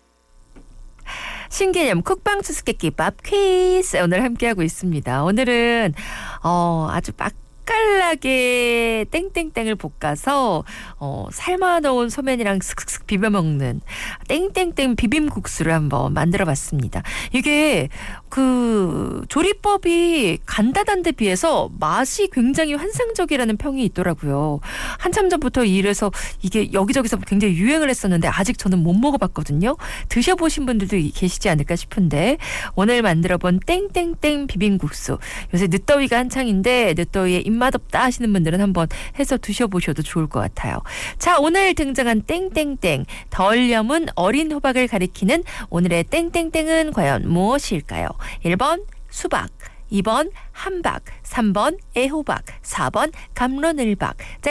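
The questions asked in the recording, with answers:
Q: 자, 오늘 등장한 땡땡땡 덜 염은 어린 호박을 가리키는 오늘의 땡땡땡은 과연 무엇일까요?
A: 3: 애호박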